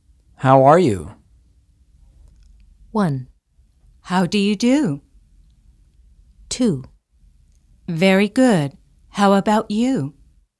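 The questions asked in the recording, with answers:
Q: How are you?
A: 2: Very good. How about you?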